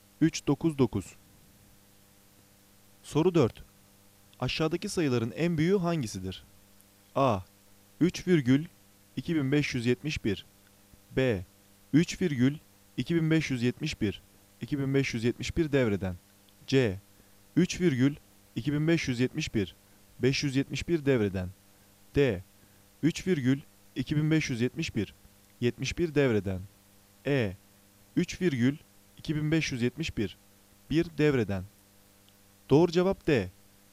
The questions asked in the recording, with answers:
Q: Aşağıdaki sayıların en büyüğü hangisidir?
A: Doğru cevap D. 3,2571. 71 devreden.